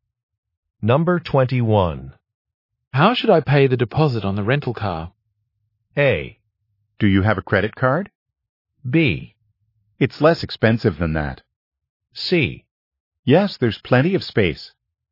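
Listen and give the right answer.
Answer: A: Do you have a credit card?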